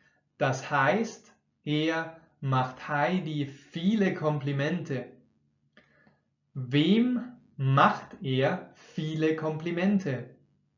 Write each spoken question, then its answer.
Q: Wem macht er viele Komplimente?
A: Heidi. Er macht Heidi viele Komplimente.